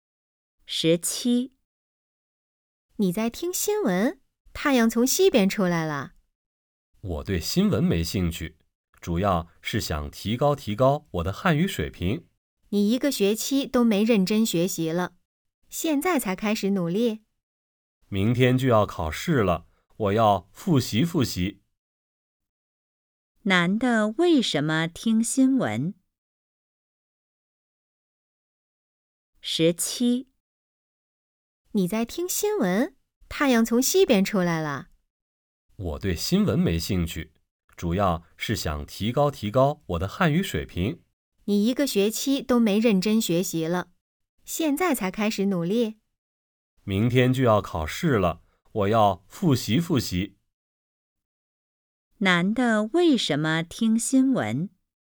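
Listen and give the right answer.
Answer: 明天要考试,想提高汉语水平、复习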